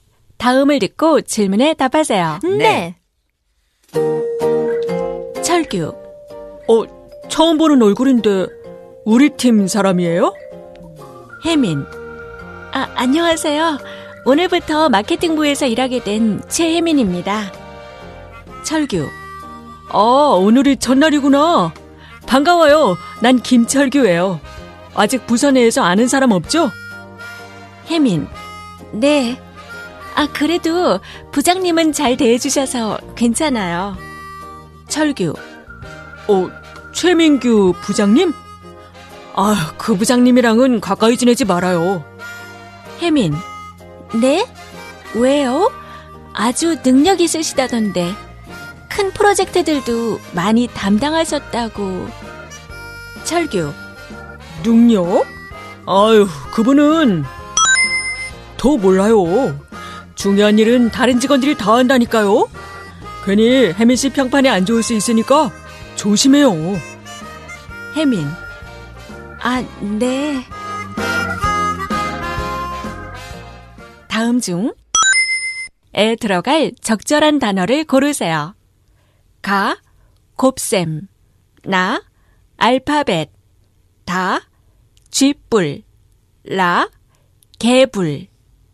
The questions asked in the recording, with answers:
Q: 다음 중에 들어갈 적절한 단어를 고르세요. 가, 곱셈, 나, 알파벳, 다, 쥐뿔, 라, 개불.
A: But I guess it is the correct answer.